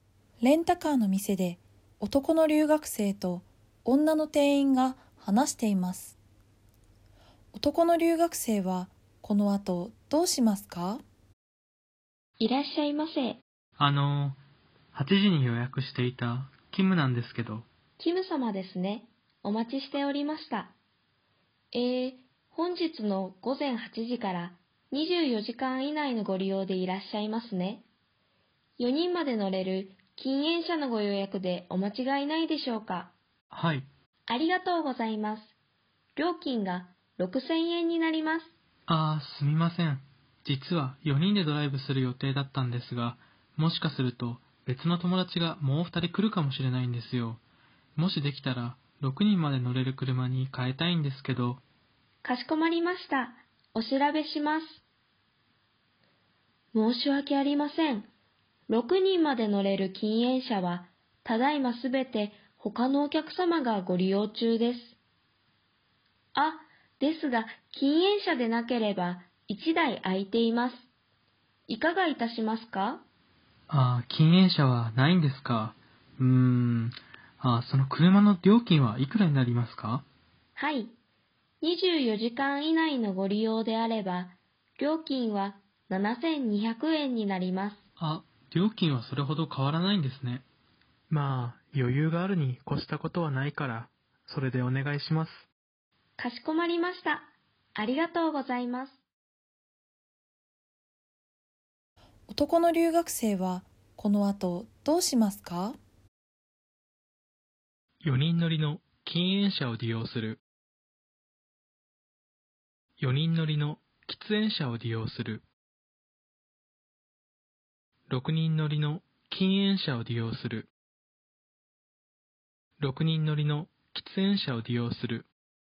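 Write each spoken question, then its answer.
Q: 男の留学生はこの後どうしますか?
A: 4: 6人乗りの喫煙車を利用する。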